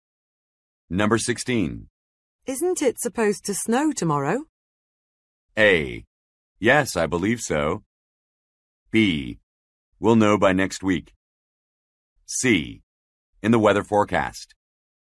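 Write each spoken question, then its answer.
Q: Isn't it supposed to snow tomorrow?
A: A: Yes, I believe so.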